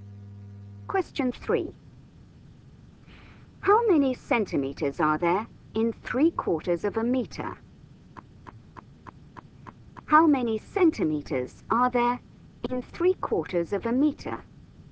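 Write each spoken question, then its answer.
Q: How many centimeters are there in 3/4 of a meter?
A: 75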